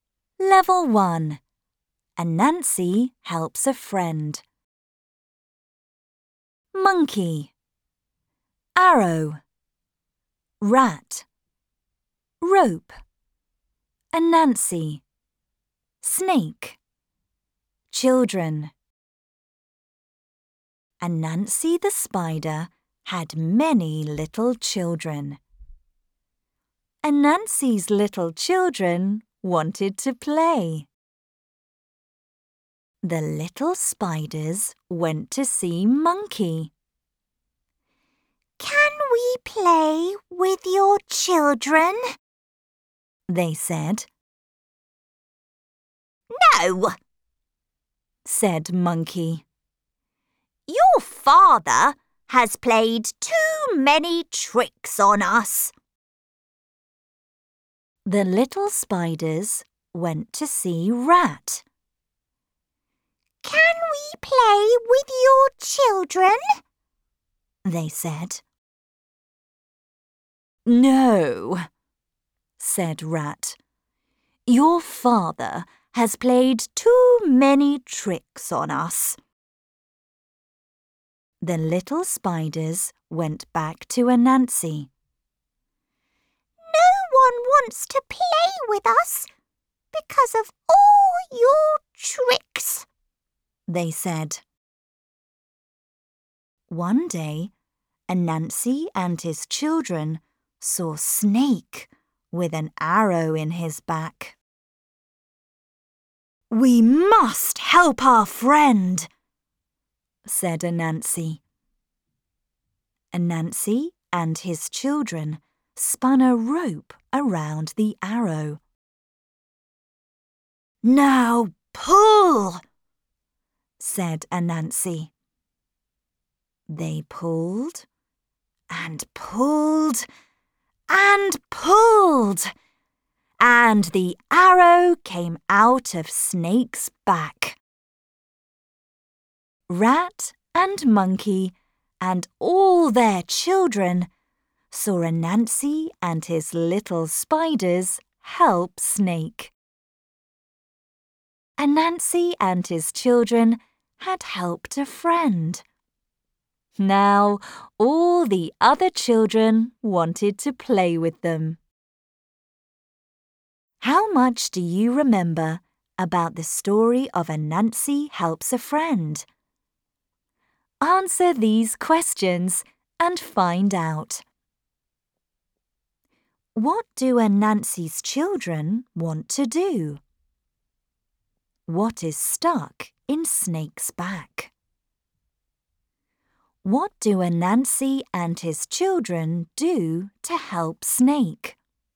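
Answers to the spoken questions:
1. Play
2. An arrow
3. They spin a rope around the arrow and pull it out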